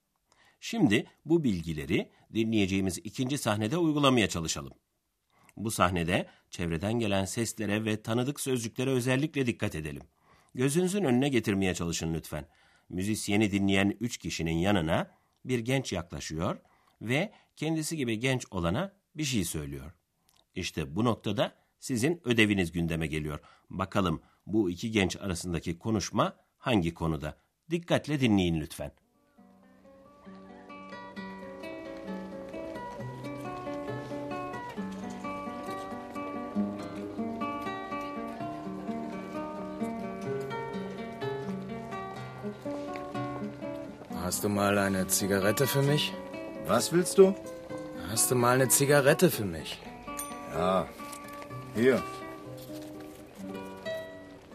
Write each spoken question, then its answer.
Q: Bakalım bu iki genç arasındaki konuşma hangi konuda?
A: Yaklaşan genç bir sigara istiyor.